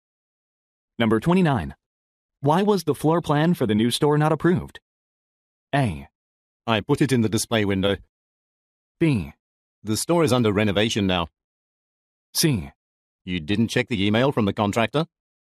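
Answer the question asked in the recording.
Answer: C: You didn't check the email from the contractor?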